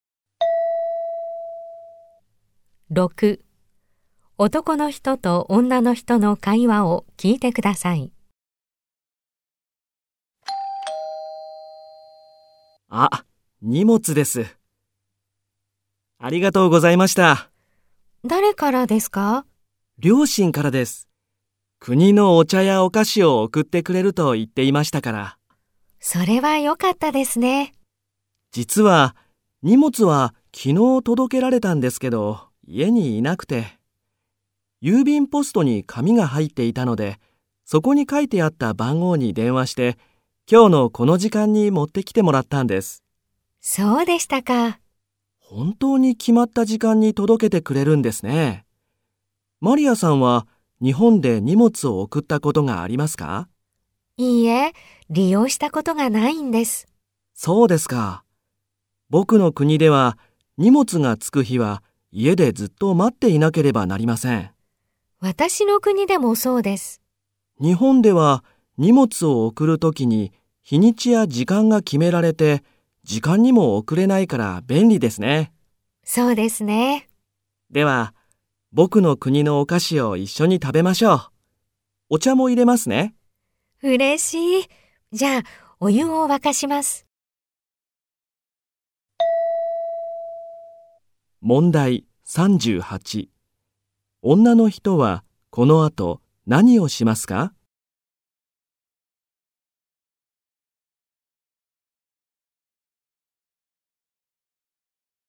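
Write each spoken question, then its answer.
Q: 女の人はこの後何をしますか?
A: お湯を沸かします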